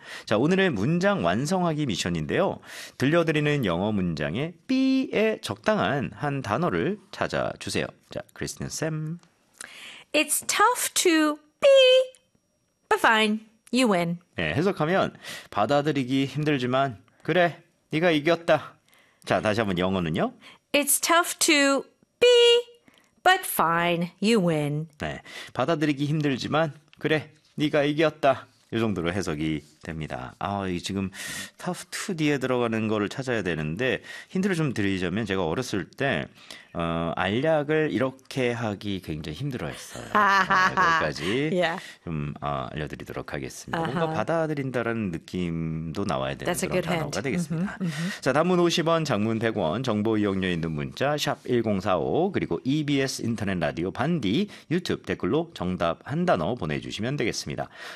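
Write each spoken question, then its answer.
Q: It's tough to be, but fine, you win.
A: swallow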